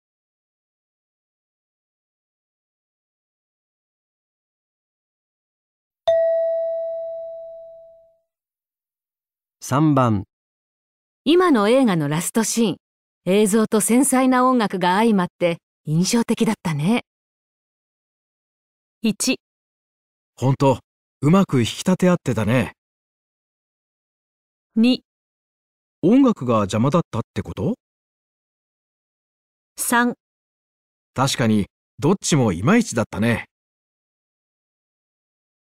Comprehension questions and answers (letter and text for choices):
今の映画のラストシーン、映像と繊細な音楽が相まって印象的だったね。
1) ほんと、上手く引き立て合ってたね。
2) 音楽が邪魔だったってこと?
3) 確かにどっちもいまいちだったね。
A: 1) ほんと、上手く引き立て合ってたね。

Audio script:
3、確かにどっちもいまいちだったね。

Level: 【N1 第1回】聴解